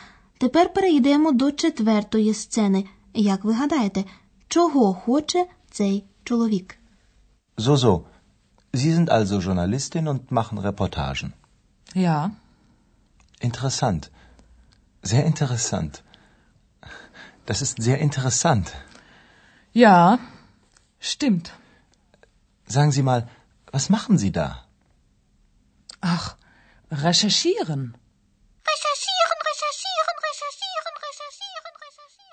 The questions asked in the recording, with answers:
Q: Як ви гадаєте, чого хоче цей чоловік?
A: Цей молодий чоловік намагався зав'язати розмову з жінкою, яка сиділа поруч.